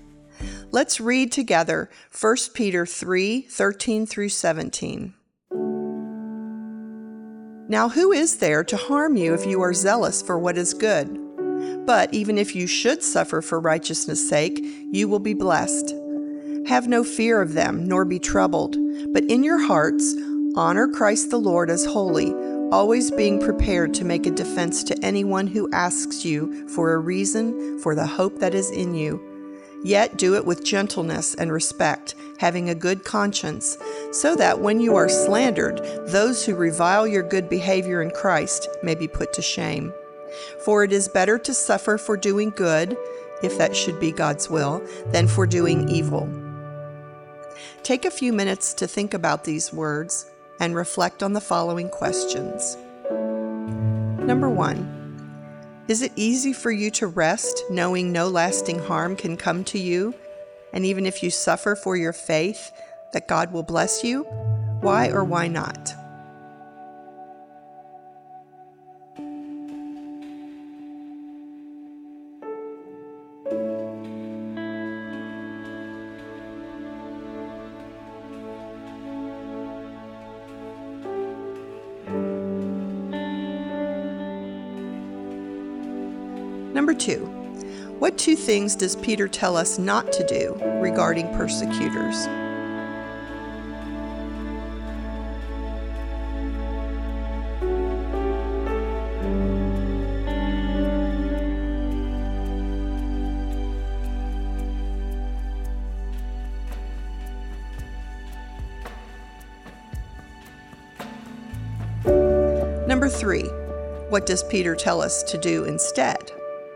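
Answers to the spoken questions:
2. Not to fear them and not to be troubled
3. Honor Christ the Lord as holy in our hearts, always ready to give a defense for our hope, with gentleness and respect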